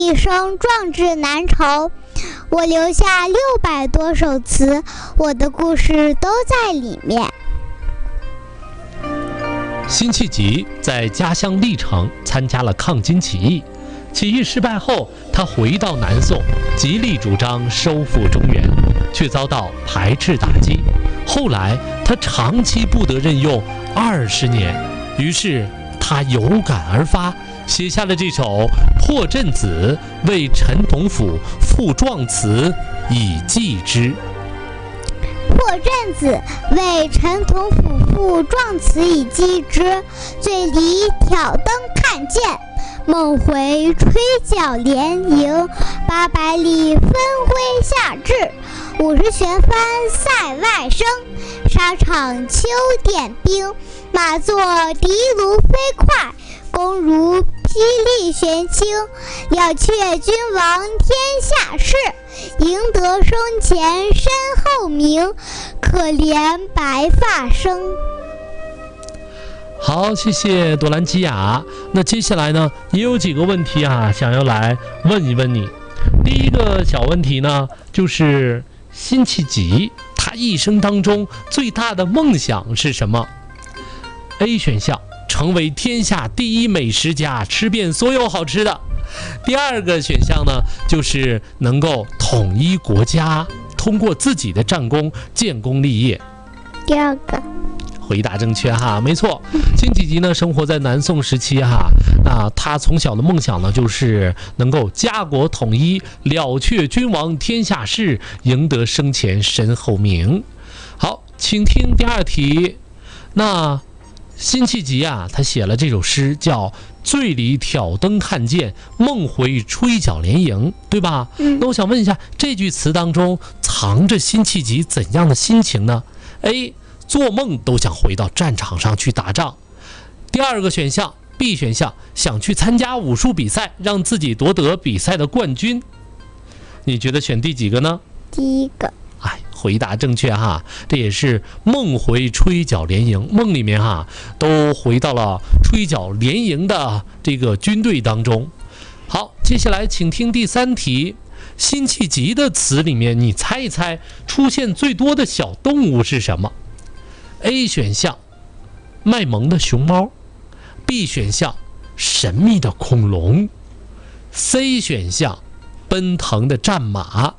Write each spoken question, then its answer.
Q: 辛弃疾他一生当中最大的梦想是什么?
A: 第二个

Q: 那我想问一下,这句词当中藏着辛弃疾怎样的心情呢?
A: 第一个。